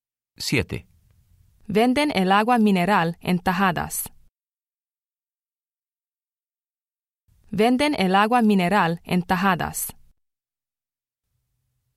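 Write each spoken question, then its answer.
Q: Venden el agua mineral en tajadas.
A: no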